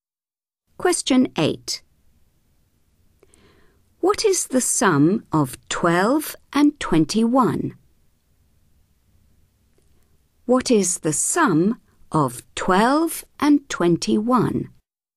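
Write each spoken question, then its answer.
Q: What is the sum of 12 and 21?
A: 33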